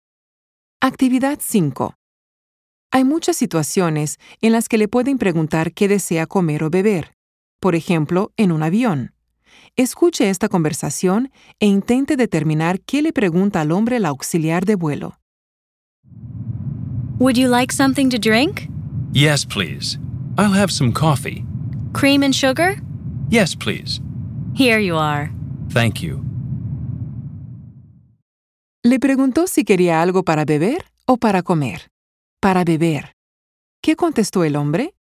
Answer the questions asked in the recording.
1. Para beber.
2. Quería un café.